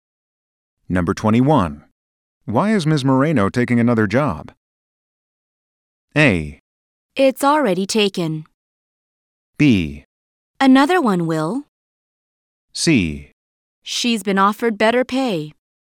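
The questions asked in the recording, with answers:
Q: Why is Ms. Moreno taking another job?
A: C: She's been offered better pay.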